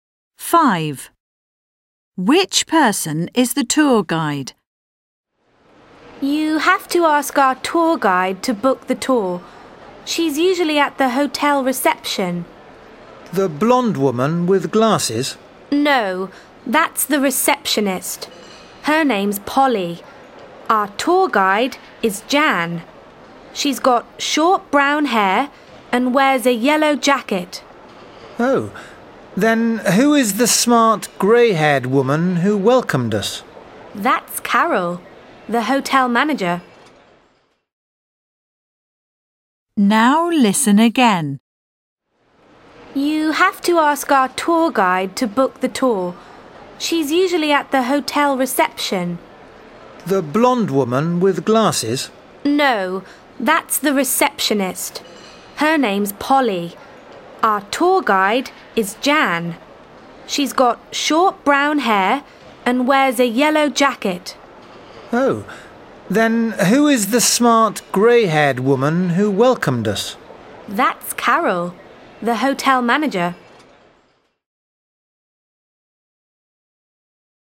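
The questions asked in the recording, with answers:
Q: Which person is the tour guide?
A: Jan, with short brown hair and a yellow jacket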